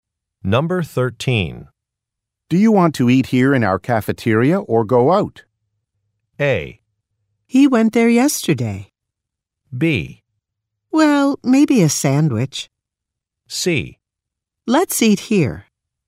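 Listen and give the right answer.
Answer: C: Let's eat here.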